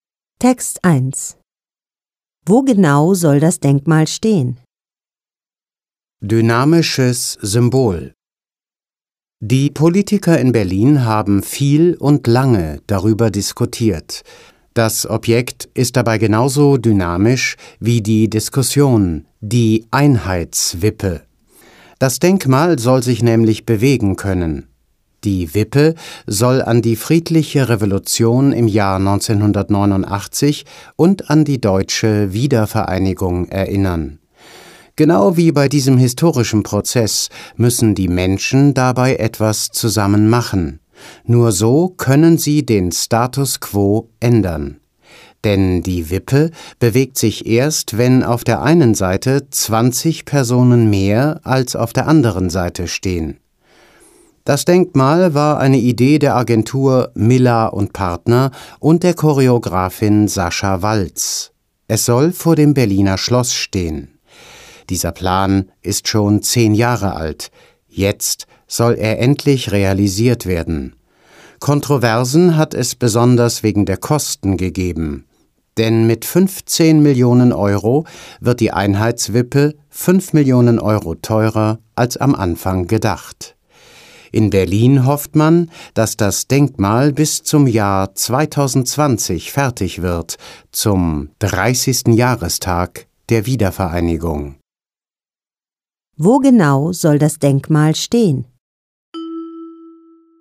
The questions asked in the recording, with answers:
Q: Wo genau soll das Denkmal stehen?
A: Vor dem Berliner Schloss.